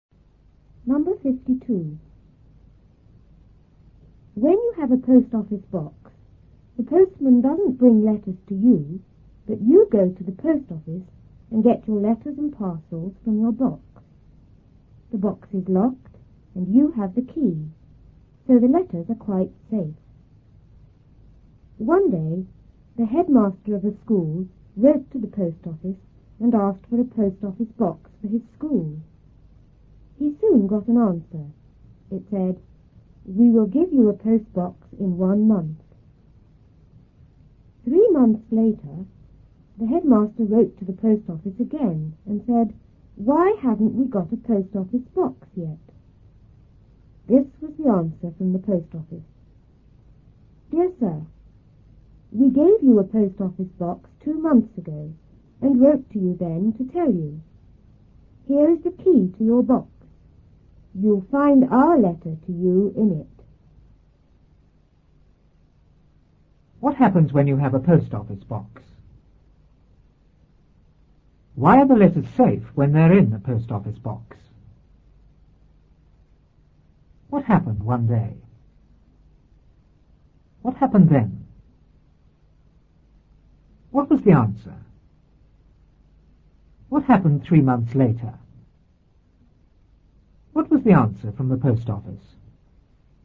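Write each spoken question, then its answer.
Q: What happens when you have a post office box?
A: The postman doesn't bring letters; you go to the post office and get your letters and parcels from your box.

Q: Why are the letters safe when they're in the post office box?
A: Because the box is locked and you have the key.

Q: What happened one day?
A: The headmaster of a school wrote to the post office and asked for a post office box for his school.

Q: What was the answer?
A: "We will give you a post box in 1 month."

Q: What happened 3 months later?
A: The headmaster wrote again asking why they hadn't got a post office box yet.

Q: What was the answer from the post office?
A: They had given him a box 2 months ago and written to tell him; the letter was in the box, and here was the key.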